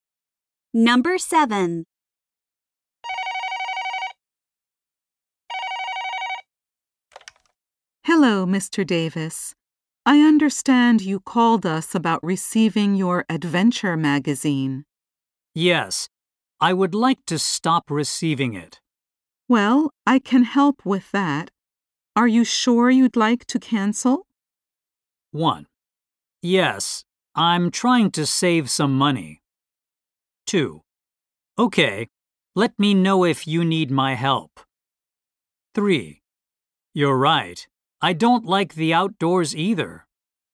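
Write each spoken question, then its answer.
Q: Are you sure you'd like to cancel?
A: 1: Yes, I'm trying to save some money.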